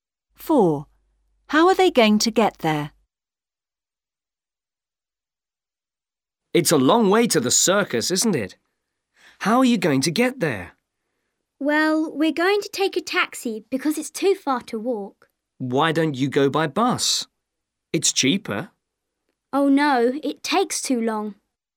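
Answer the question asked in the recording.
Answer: By taxi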